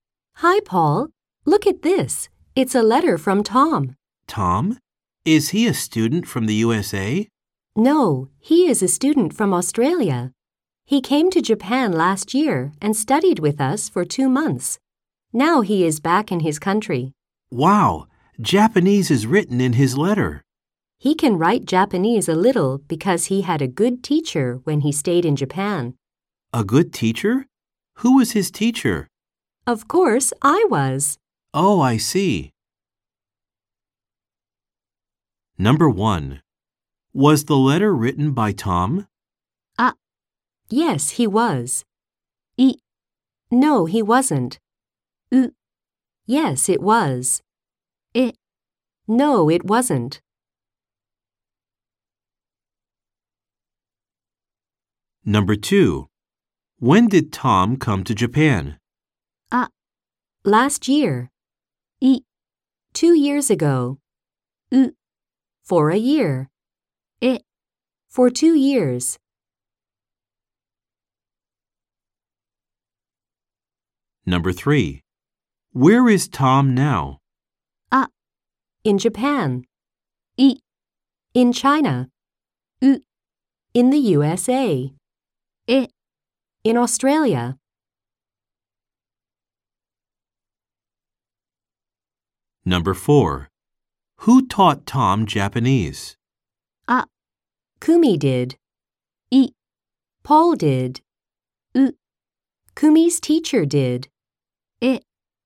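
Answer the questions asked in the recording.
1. う: Yes, it was.
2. あ: Last year.
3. え: In Australia.
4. あ: Kumi did.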